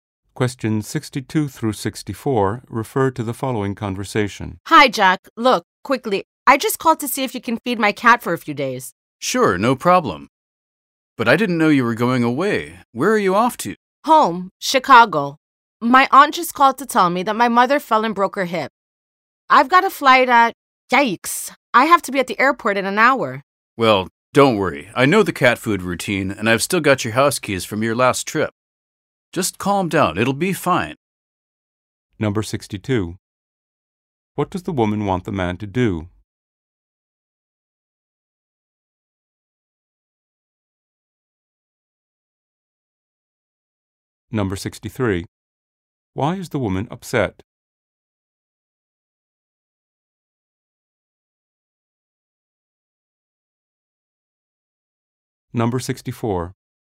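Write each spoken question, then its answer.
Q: What does the woman want the man to do?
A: Feed her cat

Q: Why is the woman upset?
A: Her mother fell and broke her hip.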